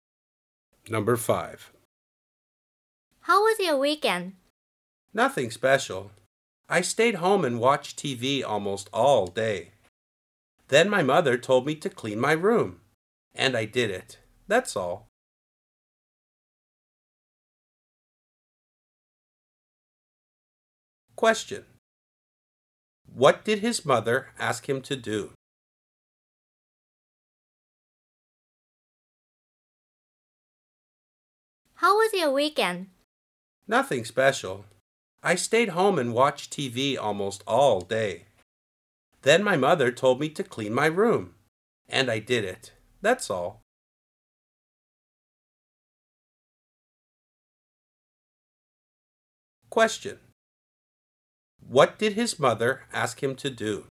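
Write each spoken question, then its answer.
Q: What did his mother ask him to do?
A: Clean his room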